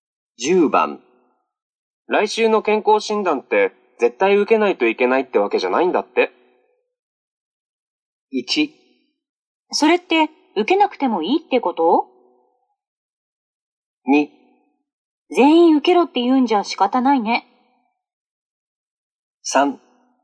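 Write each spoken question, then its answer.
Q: 来週の健康診断って絶対受けないといけないってわけじゃないんだって。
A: 1: それって受けなくてもいいってこと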